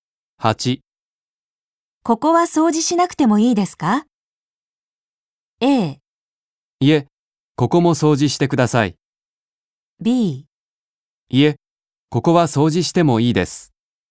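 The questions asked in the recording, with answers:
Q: ここは掃除しなくてもいいですか?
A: A: いえ、ここも掃除してください。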